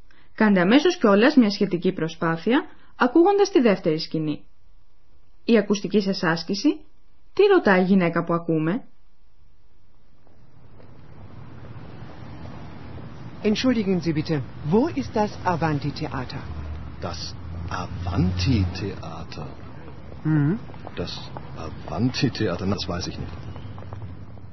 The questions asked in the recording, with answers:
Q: τι ρωτάει η γυναίκα που ακούμε?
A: Καταλάβατε πως η γυναίκα ψάχνει να βρει ένα θέατρο?